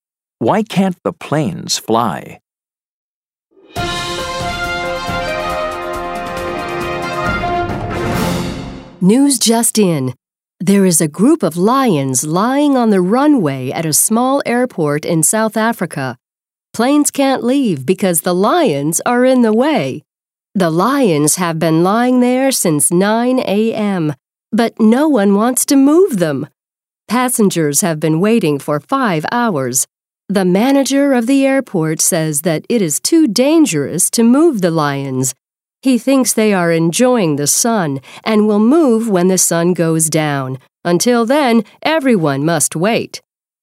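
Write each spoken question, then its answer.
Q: Why can't the planes fly?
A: Because a group of lions is lying on the runway.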